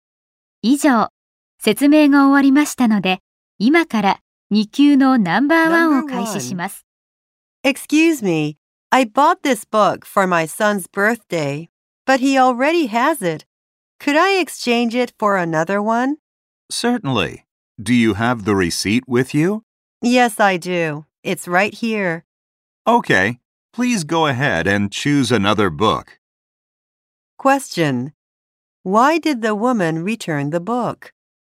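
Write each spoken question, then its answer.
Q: Why did the woman return the book?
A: Her son already has it.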